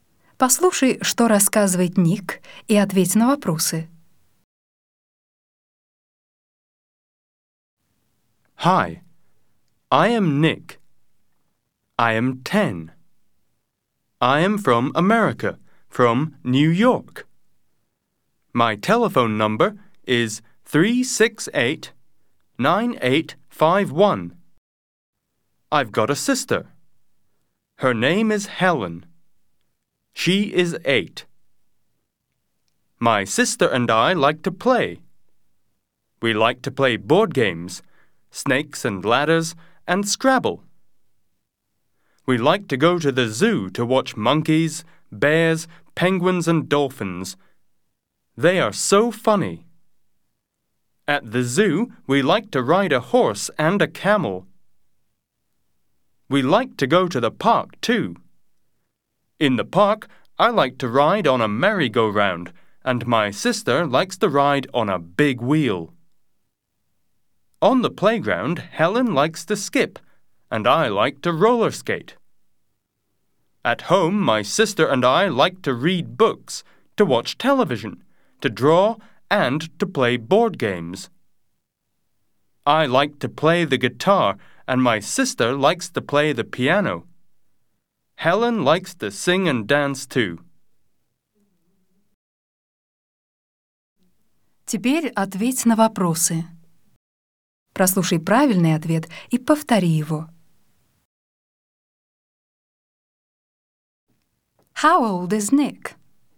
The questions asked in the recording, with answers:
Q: How old is Nick?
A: He is 10.